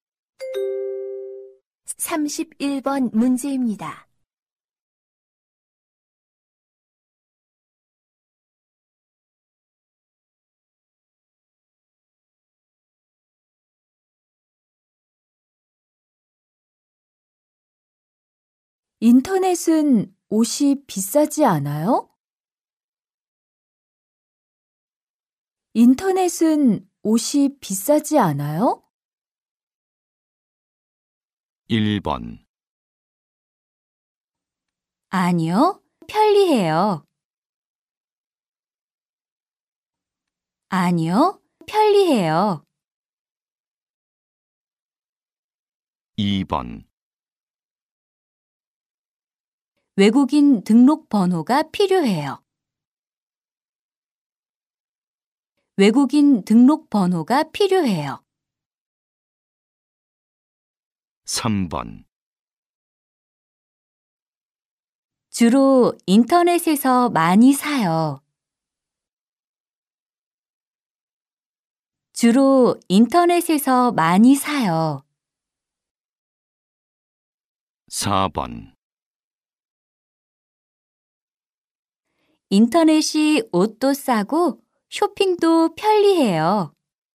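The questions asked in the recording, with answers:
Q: 인터넷은 옷이 비싸지 않아요?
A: 4: 인터넷이 옷도 싸고 쇼핑도 편리해요.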